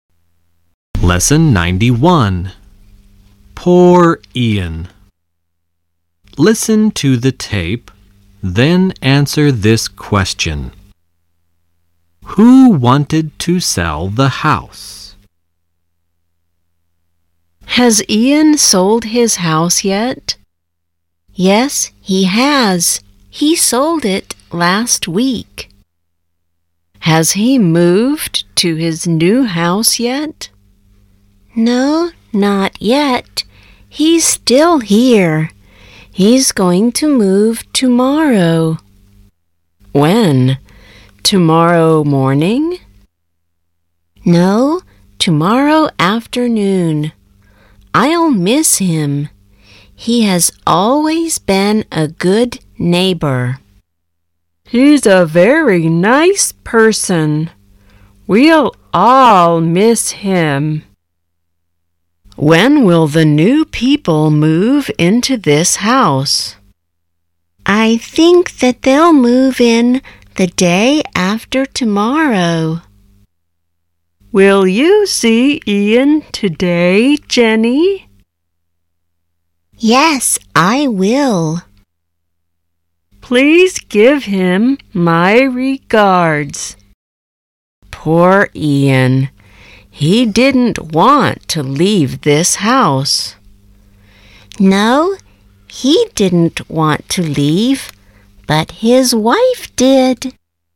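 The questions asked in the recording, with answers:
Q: Who wanted to sell the house?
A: Ian's wife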